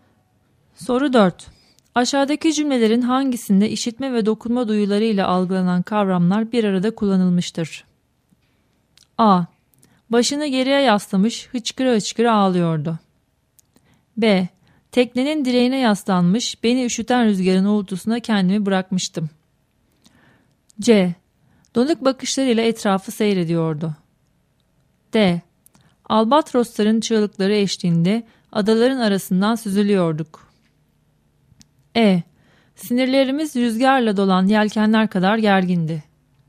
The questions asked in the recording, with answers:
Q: Aşağıdaki cümlelerin hangisinde işitme ve dokunma duyularıyla algılanan kavramlar bir arada kullanılmıştır?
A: Doğru cevap B şıkkı.